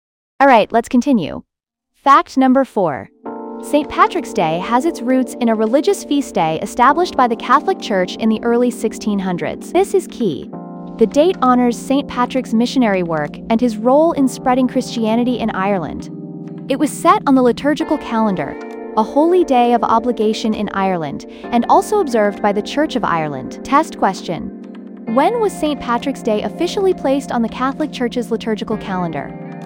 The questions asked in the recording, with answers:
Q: When was St. Patrick's Day officially placed on the Catholic Church's liturgical calendar?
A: Correct answer. Early 1600s.